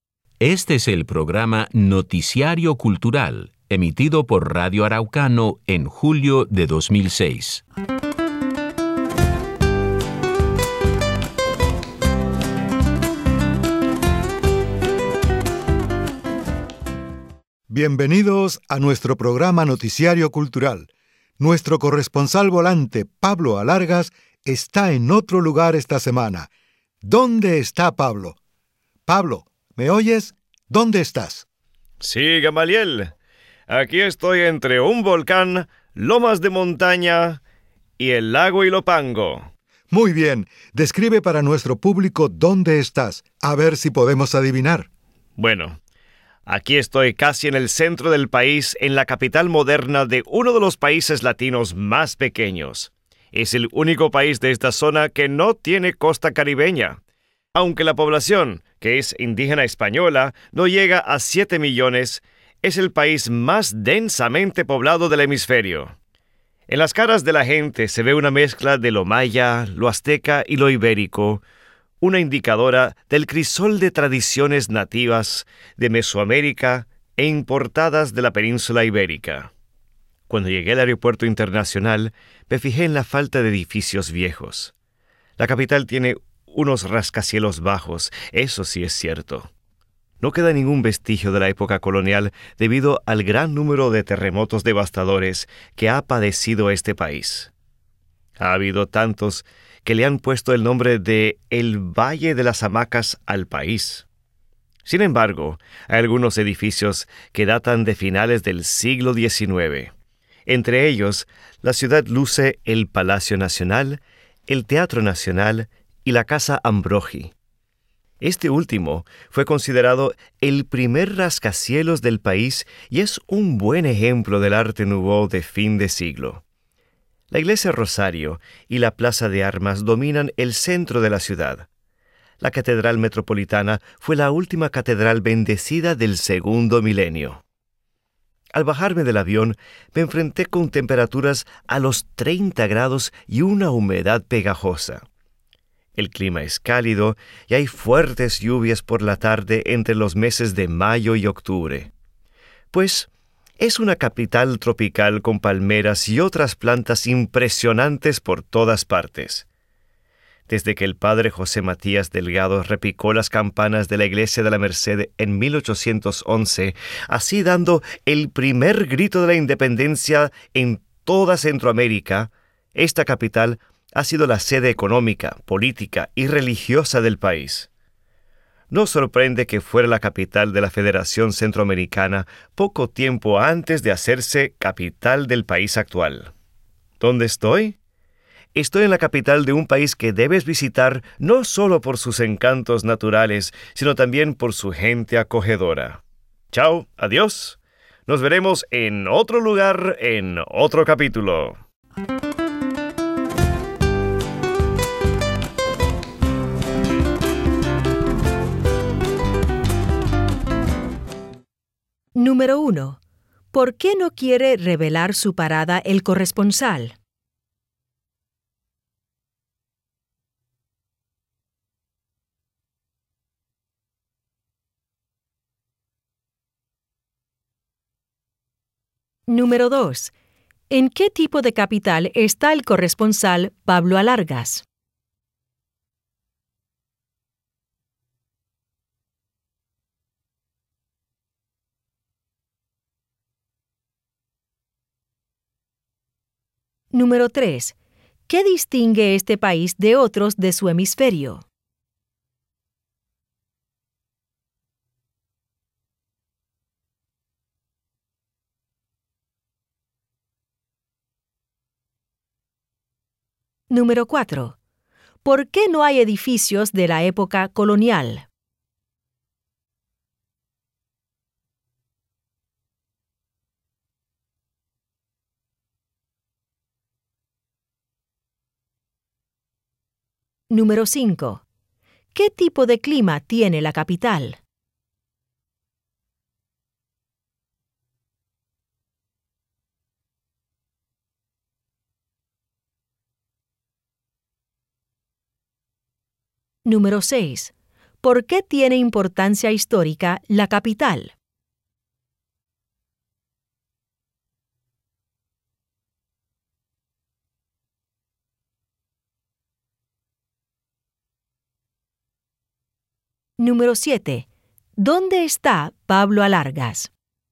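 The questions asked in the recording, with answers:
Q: ¿Qué distingue este país de otros de su hemisferio?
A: Es el país más densamente poblado del hemisferio

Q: ¿Por qué no hay edificios de la época colonial?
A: Por el gran número de terremotos devastadores

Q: ¿qué tipo de clima tiene la capital?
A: Cálido, húmedo y tropical, con fuertes lluvias por la tarde de mayo a octubre

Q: ¿Por qué tiene importancia histórica la capital?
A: Allí se dio el primer grito de independencia de Centroamérica en 1811

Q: ¿Dónde está Pablo Alargas?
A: En San Salvador, El Salvador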